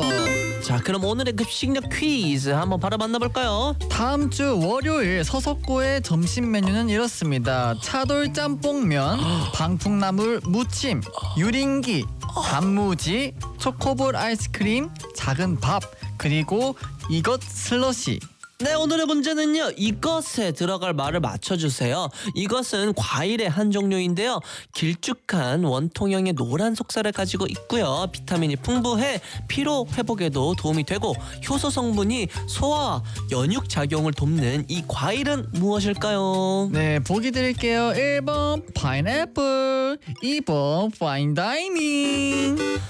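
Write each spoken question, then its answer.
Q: 이것은 과일의 한 종류인데요, 길쭉한 원통형의 노란 속살을 가지고 있고요, 비타민이 풍부해 피로 회복에도 도움이 되고, 효소 성분이 소화 연육작용을 돕는 이 과일은 무엇일까요?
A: 1번: 파인애플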